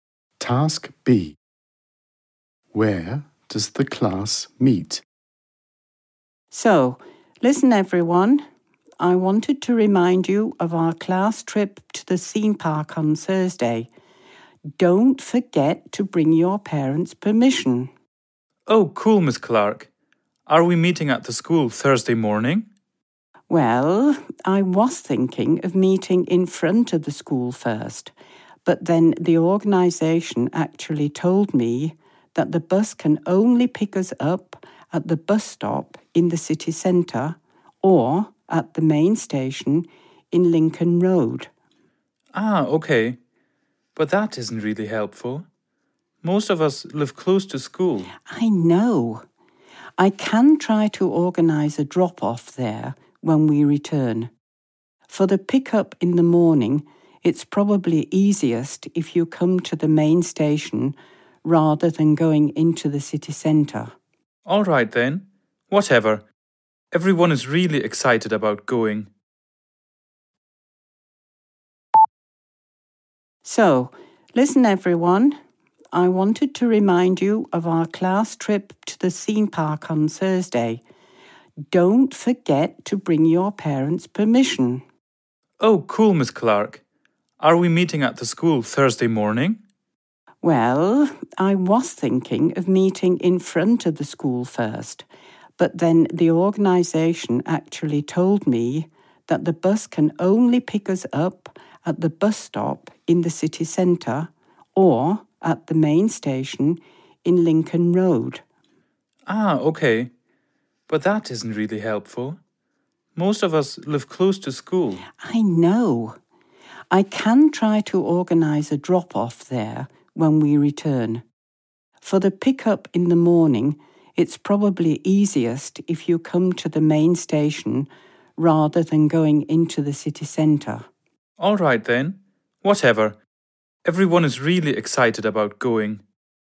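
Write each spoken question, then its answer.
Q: Where does the class meet?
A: At the main station in Lincoln Road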